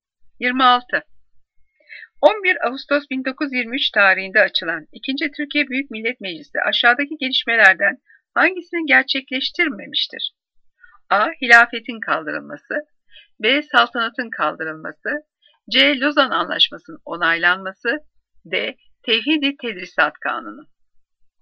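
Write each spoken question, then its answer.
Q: Türkiye Büyük Millet Meclisi aşağıdaki gelişmelerden hangisini gerçekleştirmemiştir?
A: B: Saltanatın kaldırılması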